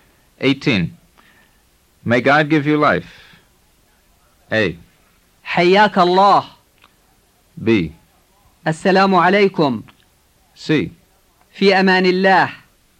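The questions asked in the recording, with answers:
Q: May God give you life.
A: A: حياك الله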